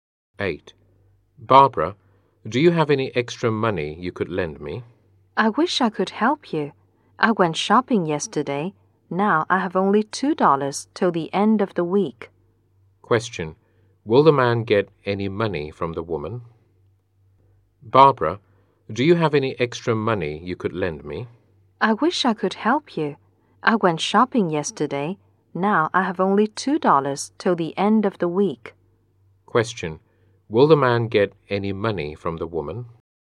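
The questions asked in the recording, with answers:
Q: Will the man get any money from the woman?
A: No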